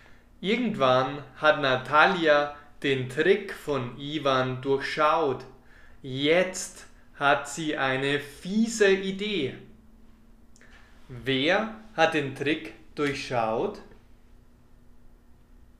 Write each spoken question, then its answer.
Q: Wer hat den Trick durchschaut?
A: Natalia. Sie hat den Trick von Ivan durchschaut.